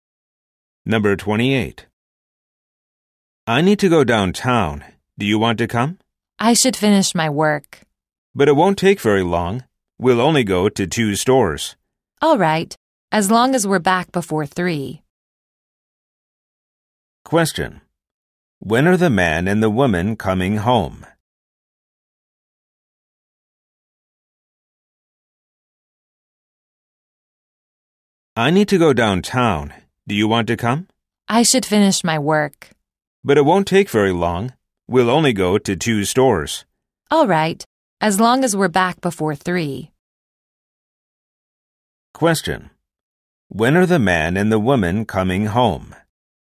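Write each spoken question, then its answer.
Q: When are the man and the woman coming home?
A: Before 3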